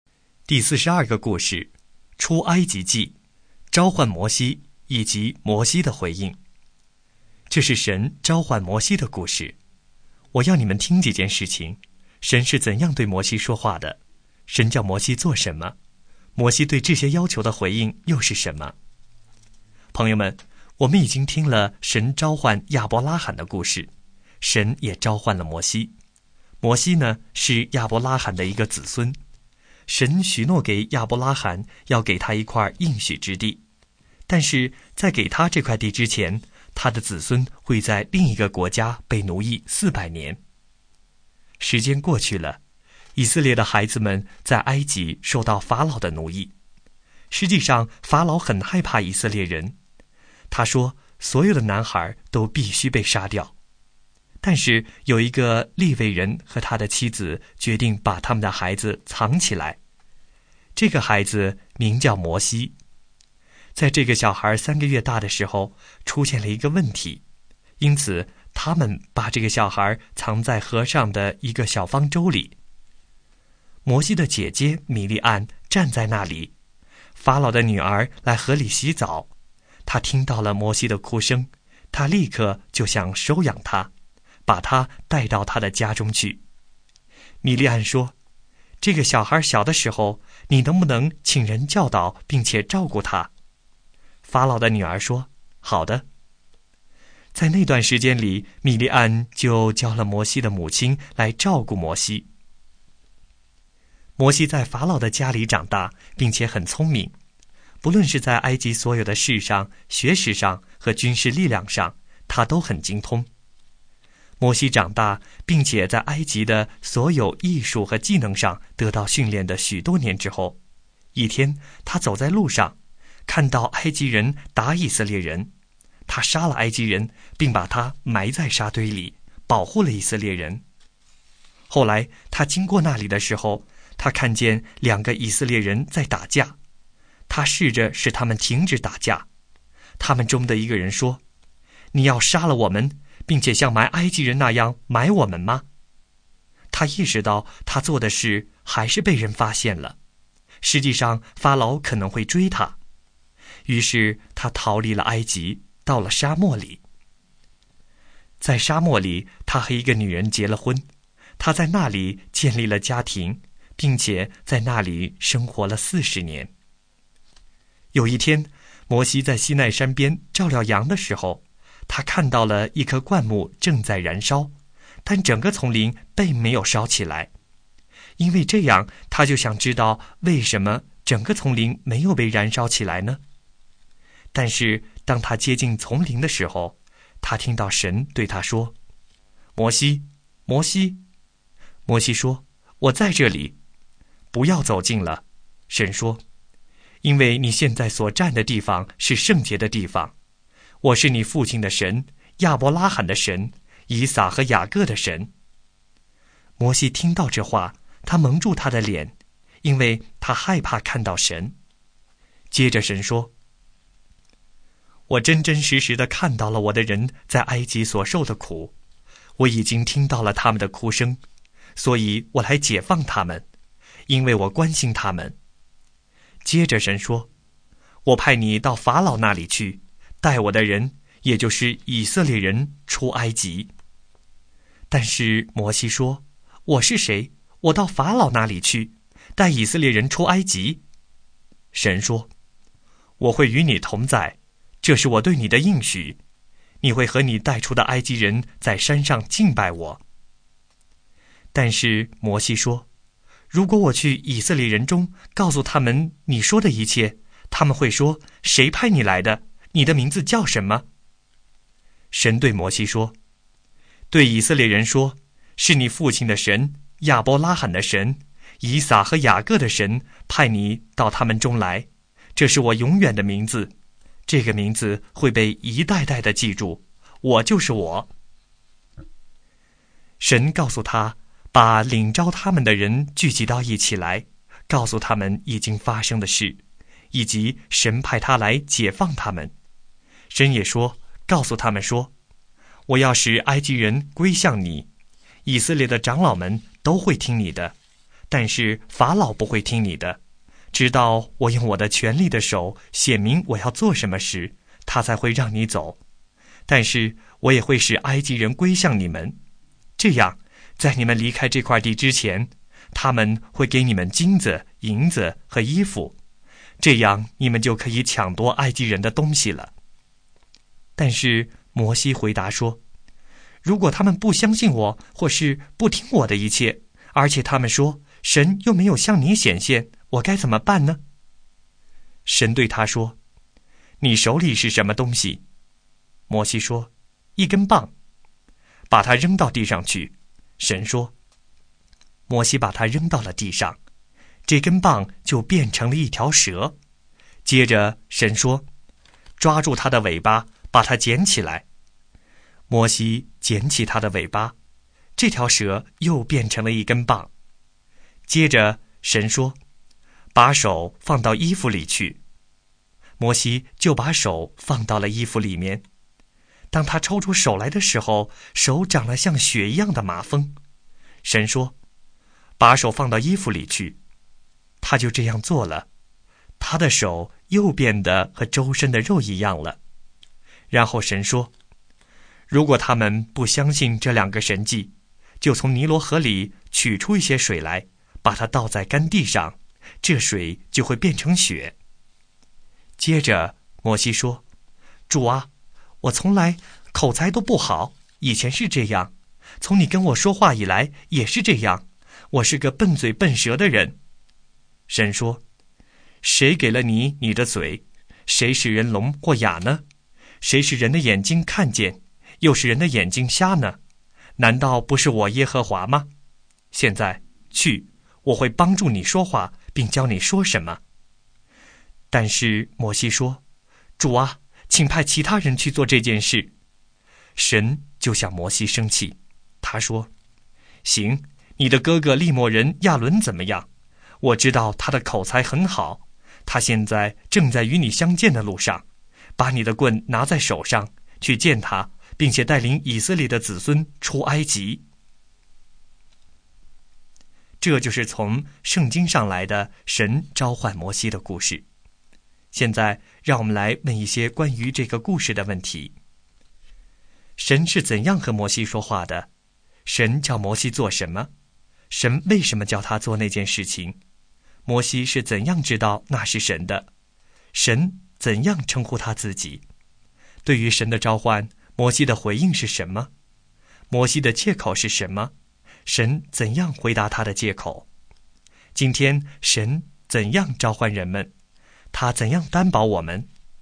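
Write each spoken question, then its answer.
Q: 神是怎样和摩西说话的?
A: 从一丛燃烧却没有烧毁的灌木中对他说话

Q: 神叫摩西做什么?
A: 到法老那里去,带以色列人出埃及

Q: 神为什么叫他做那件事情?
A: 因为神看到以色列人在埃及受苦,听到他们的哭声,关心他们,要解放他们

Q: 神怎样称呼他自己?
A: 我就是我;你父亲的神,亚伯拉罕、以撒和雅各的神

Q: 对于神的召唤,摩西的回应是什么?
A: 他说:我是谁,能到法老那里去带以色列人出埃及?最后请神派别人去

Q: 摩西的借口是什么?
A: 以色列人不会相信他、不听他的话;他口才不好,笨嘴笨舌

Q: 神怎样回答他的借口?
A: 神应许与他同在,给他神迹(棒变蛇、手长麻风、水变血),说会帮他说话,并派他的哥哥亚伦与他同去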